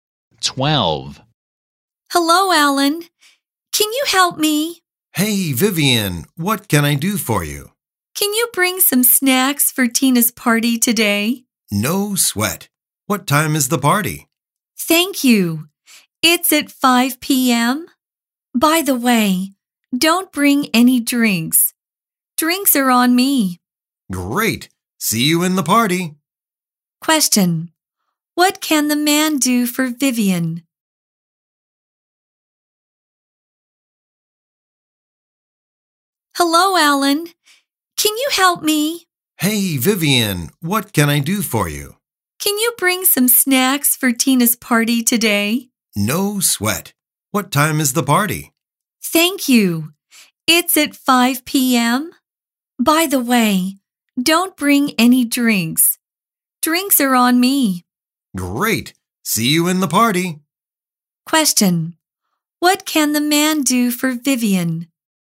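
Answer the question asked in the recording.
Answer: Bring some snacks for Tina's party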